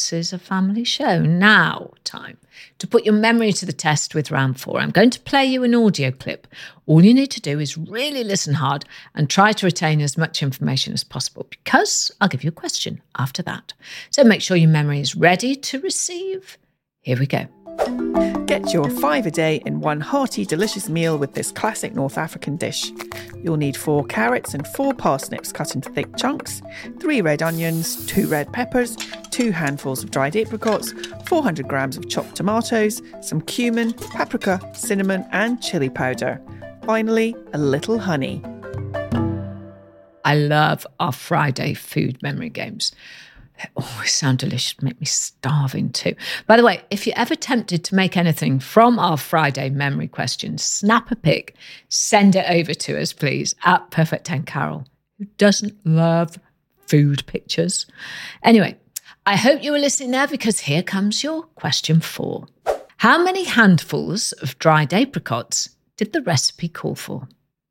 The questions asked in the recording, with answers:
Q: How many handfuls of dried apricots did the recipe call for?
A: Well, the answer was 2 handfuls.